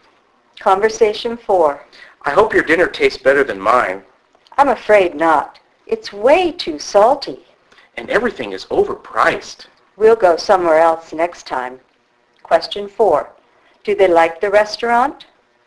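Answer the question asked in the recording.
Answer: No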